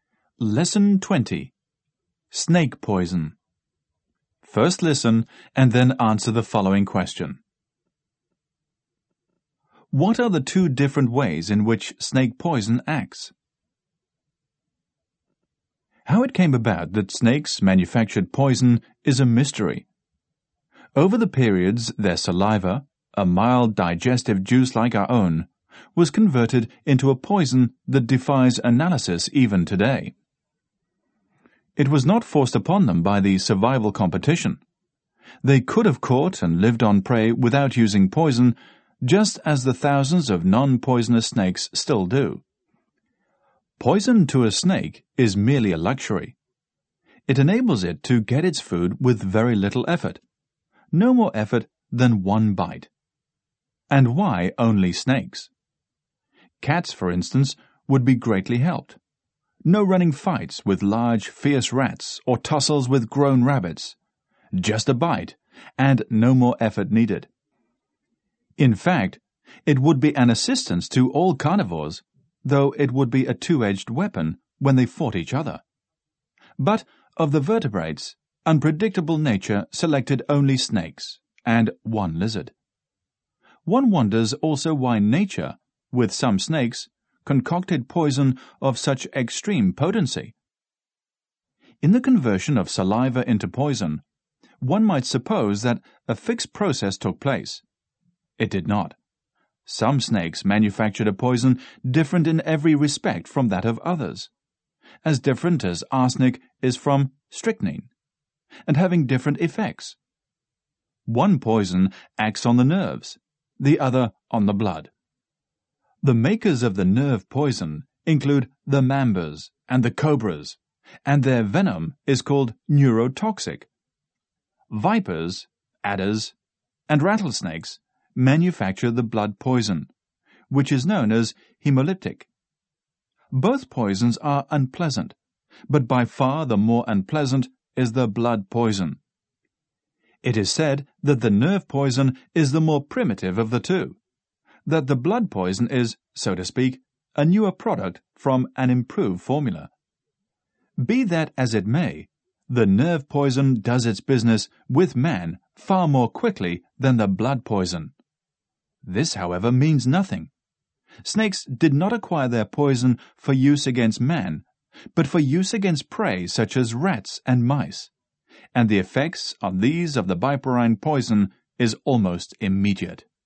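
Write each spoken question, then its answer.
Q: What are the two different ways in which snake poison acts?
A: One poison acts on the nerves (neurotoxic), the other on the blood (hemolytic).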